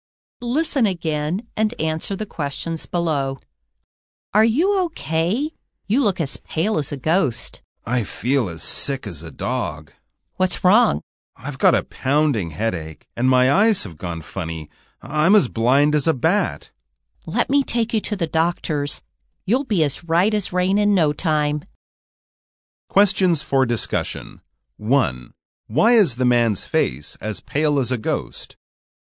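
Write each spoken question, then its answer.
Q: Why is the man's face as pale as a ghost?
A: He feels very sick: he has a pounding headache and his eyes have gone funny.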